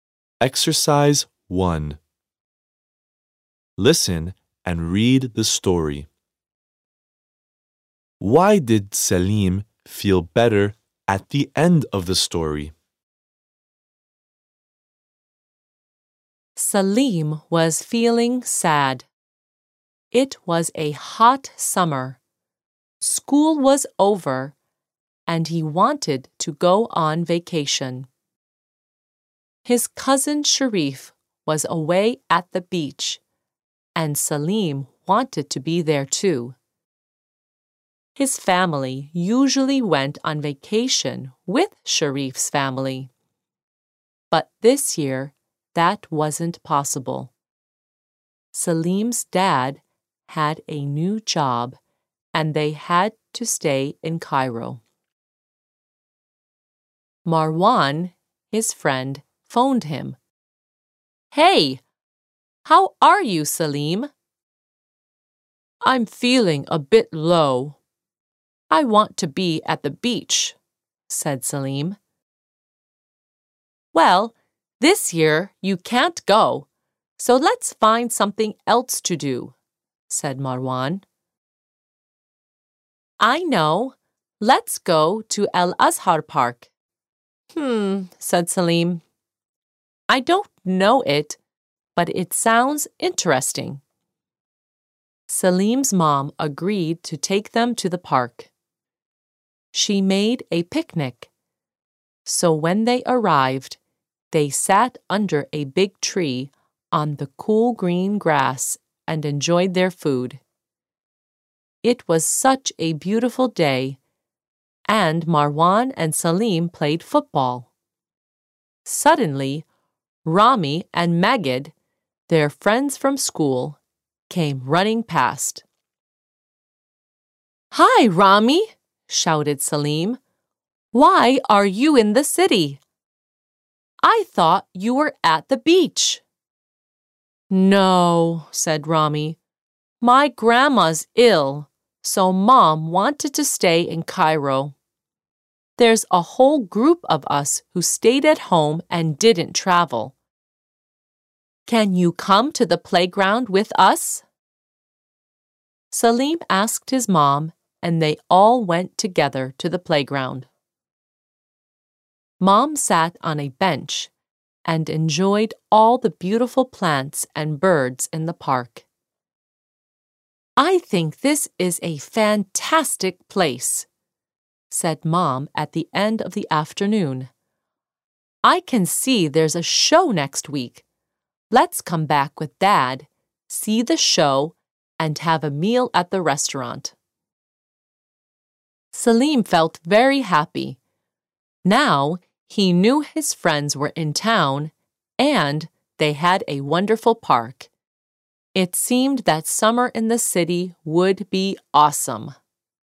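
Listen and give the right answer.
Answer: Because he knew his friends were in town and they had a wonderful park to enjoy.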